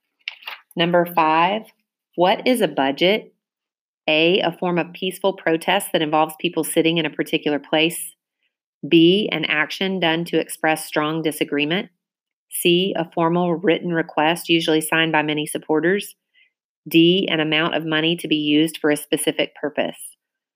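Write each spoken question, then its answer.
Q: what is a budget?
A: D: an amount of money to be used for a specific purpose.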